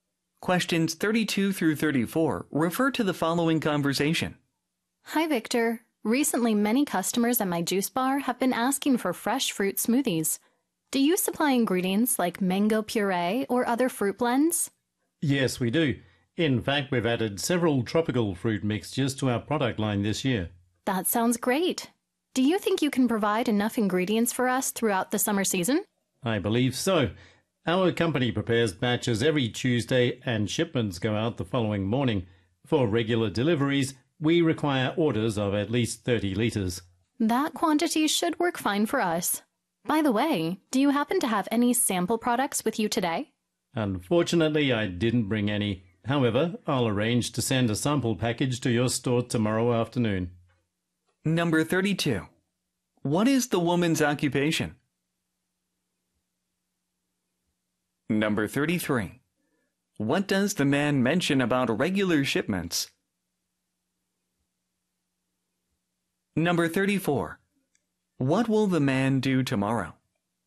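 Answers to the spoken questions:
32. She owns/runs a juice bar
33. They require orders of at least 30 liters
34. Send a sample package to the woman's store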